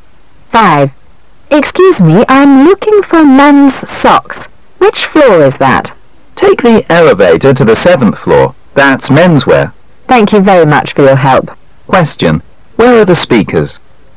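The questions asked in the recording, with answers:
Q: Where are the speakers?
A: In a department store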